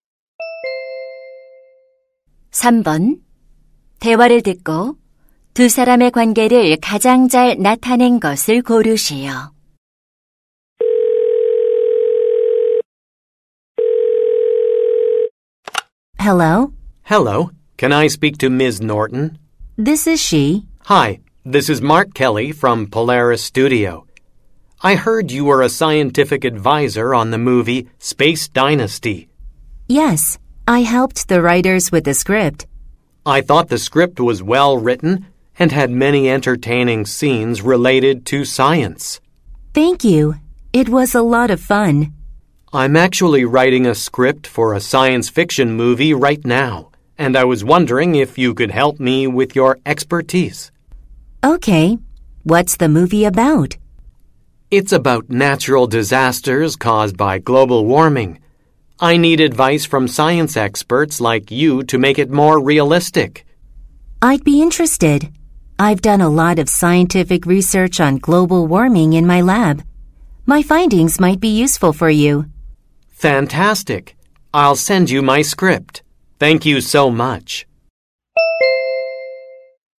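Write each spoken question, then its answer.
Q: 대화를 듣고 두 사람의 관계를 가장 잘 나타낸 것을 고르시오.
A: 영화 각본가 — 과학 자문가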